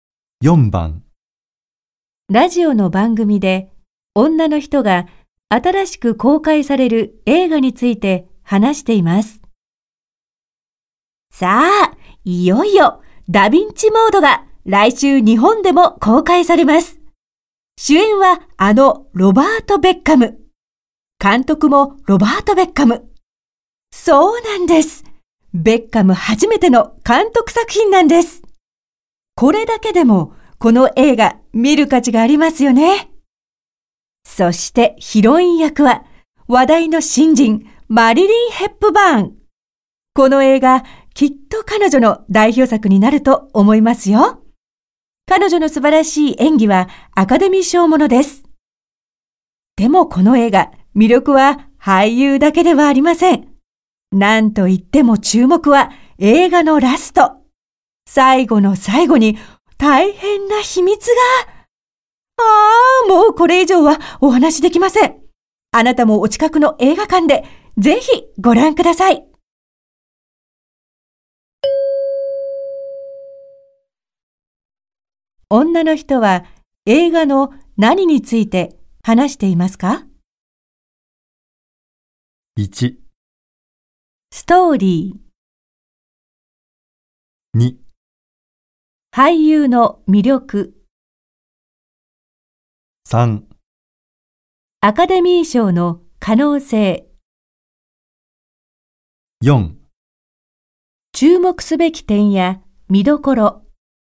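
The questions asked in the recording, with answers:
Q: 女の人は映画の何について話していますか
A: 4: 注目すべき点や見どころ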